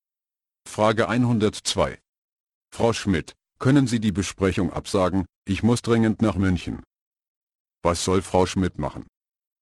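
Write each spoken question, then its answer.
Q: Was soll Frau Schmidt machen?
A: die Besprechung absagen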